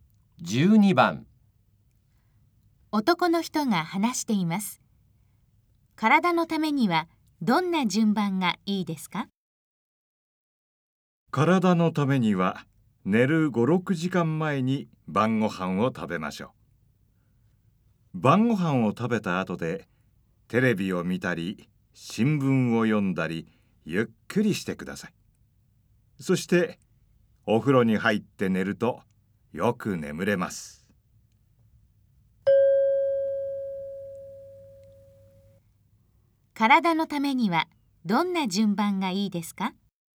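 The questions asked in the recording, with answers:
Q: 体のためにはどんな順番がいいですか?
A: 晩ご飯を食べる→テレビを見たり新聞を読んだりする→お風呂に入る→寝る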